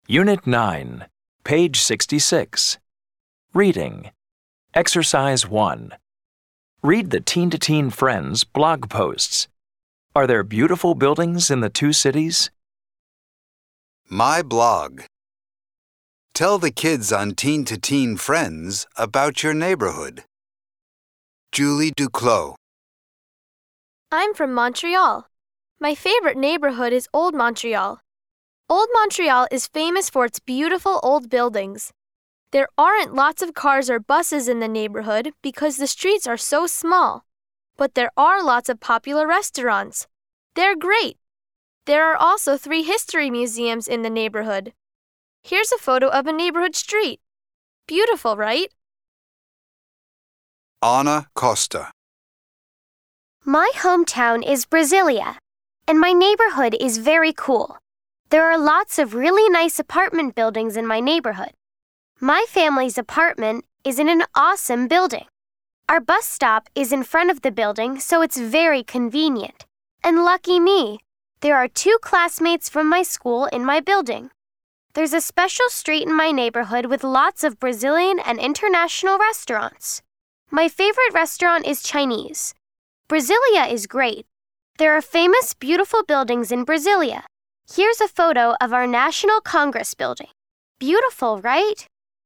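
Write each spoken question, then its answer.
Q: Are there beautiful buildings in the two cities?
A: Yes, there are beautiful buildings in both Montreal and Brasilia.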